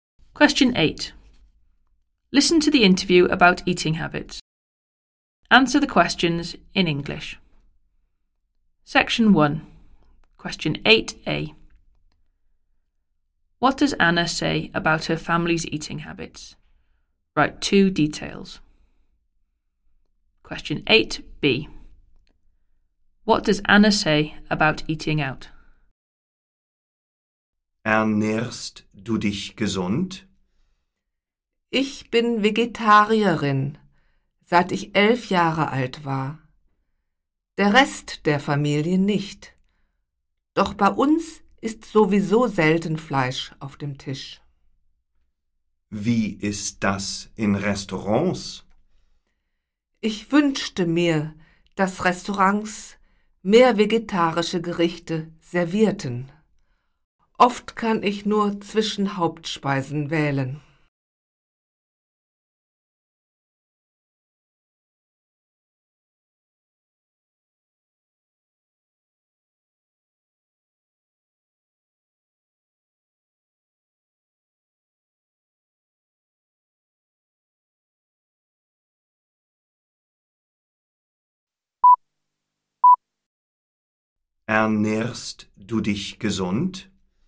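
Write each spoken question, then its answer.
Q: What does Anna say about her family's eating habits?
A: The rest of the family are not vegetarian, but they rarely eat meat

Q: What does Anna say about eating out?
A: She wishes restaurants served more vegetarian dishes; often she has little choice of main courses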